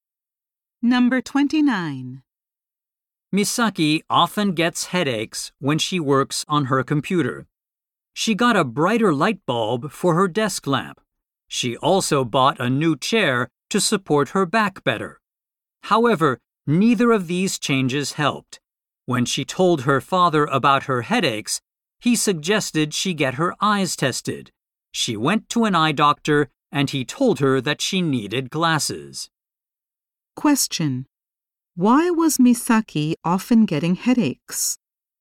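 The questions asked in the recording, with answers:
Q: Why was Misaki often getting headaches?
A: She needed glasses.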